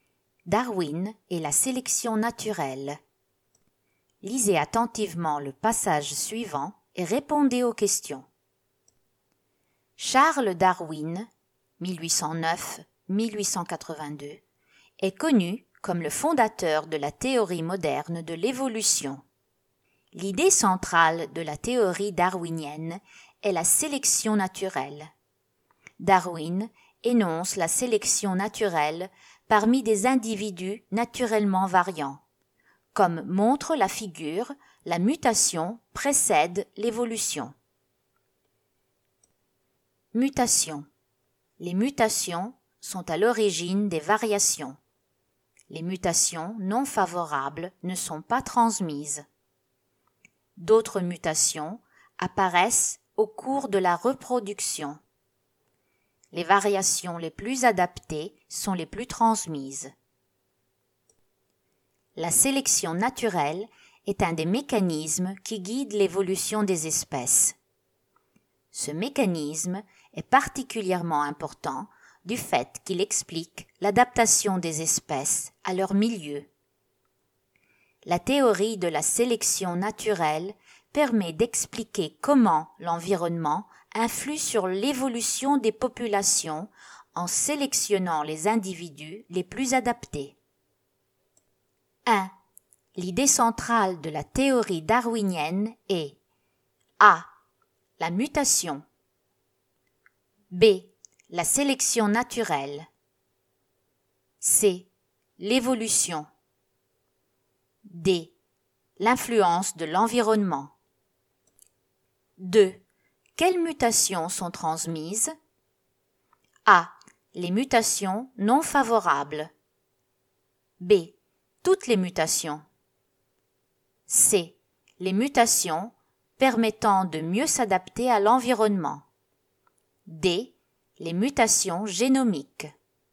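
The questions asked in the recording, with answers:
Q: L'idée centrale de la théorie darwinienne est A.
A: B: La sélection naturelle

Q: Quelles mutations sont transmises?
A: C: Les mutations permettant de mieux s'adapter à l'environnement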